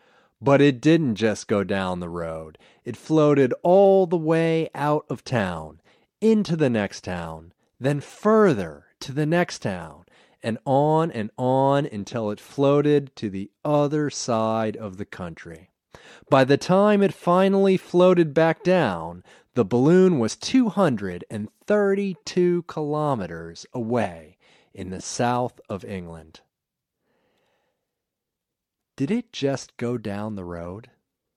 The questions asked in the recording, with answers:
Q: Did it just go down the road?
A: No, it didn't just go down the road.